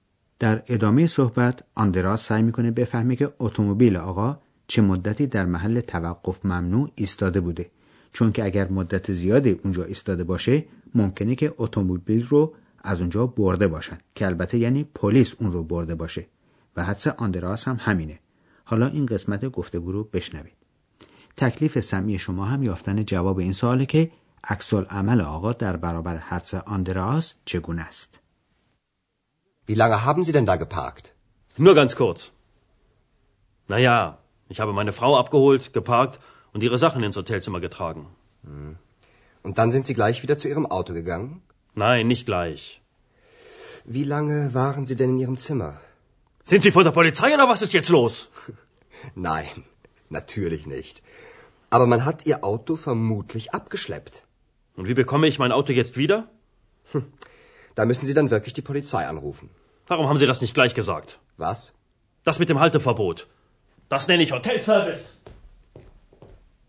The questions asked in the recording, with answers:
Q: تکلیف سمی شما هم یافتن جواب این سواله که عکس عمل آقا در برابر حدس آندراس چگونه است.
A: میهمان هتل ناراحتی بردن اتومبیلش رو سر آندراس خالی میکنه و معتقده که آندراس باید در همون بد و ورودش به او میگفت که توقف اتومبیل ها در حاشیه خیابان بیسمارک ممنوعه